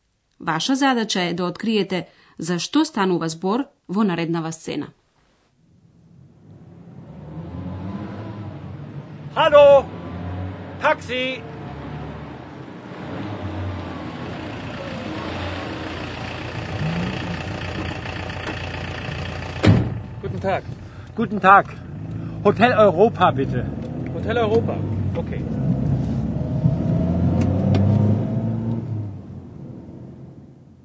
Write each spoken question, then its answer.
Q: Ваша задача е да откриете за што станува збор во нареднава сцена.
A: Човек стои на улица и запира едно такси.